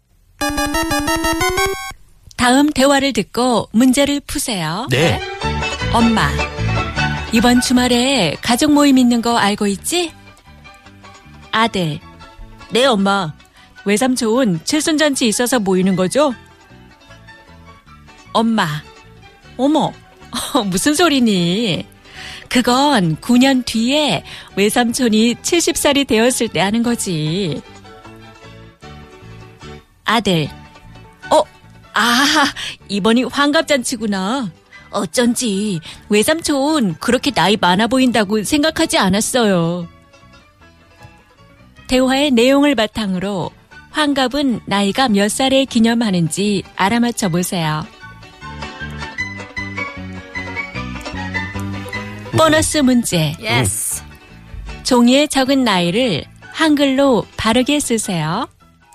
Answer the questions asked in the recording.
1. 61 years old.
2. 예순 한 살.